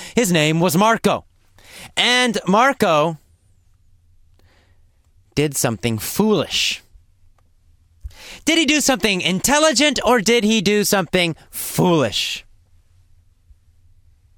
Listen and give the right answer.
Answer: Well, he did something foolish.